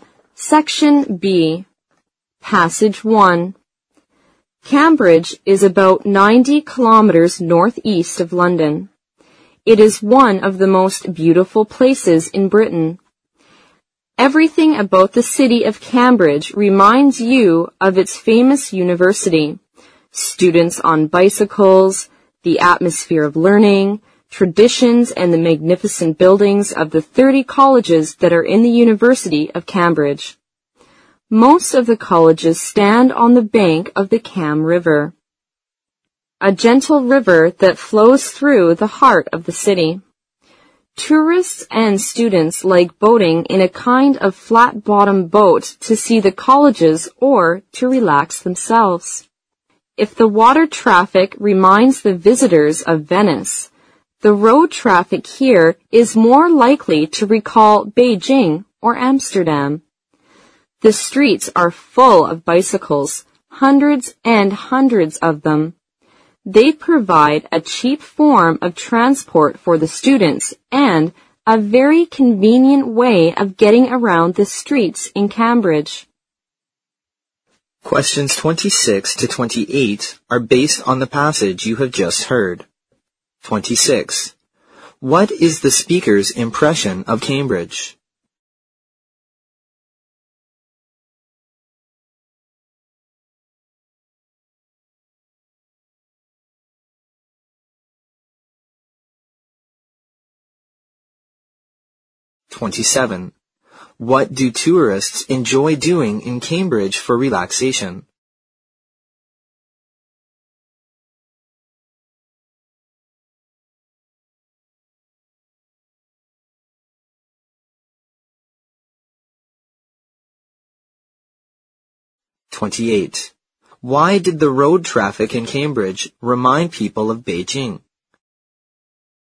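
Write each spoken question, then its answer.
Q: What is the speaker's impression of Cambridge?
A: It is one of the most beautiful places in Britain.

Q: What do tourists enjoy doing in Cambridge for relaxation?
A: Boating on the Cam River in flat-bottom boats.

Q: Why did the road traffic in Cambridge remind people of Beijing?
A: The streets are full of bicycles.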